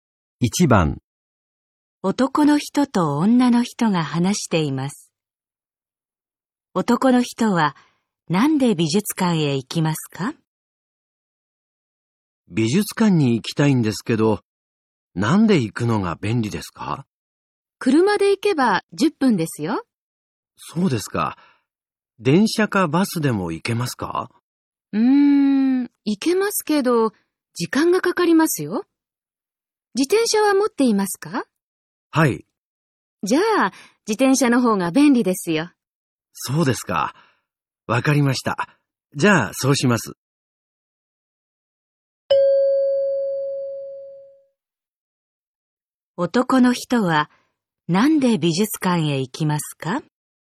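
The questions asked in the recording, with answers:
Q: 男の人はなんで美術館へ行きますか?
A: 自転車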